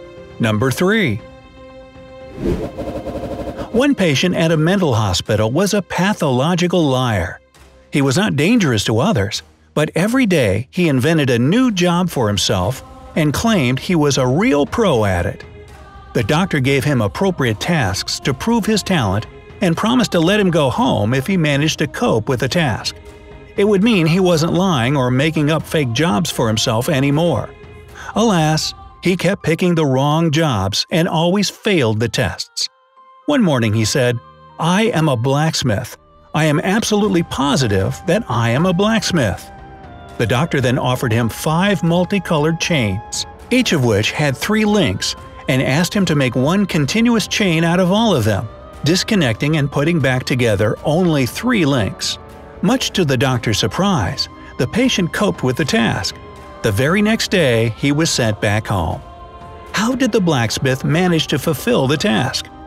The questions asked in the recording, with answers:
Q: How did the blacksmith manage to fulfill the task?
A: The blacksmith disconnected 3 links of one chain and, using them, connected the remaining 4 parts.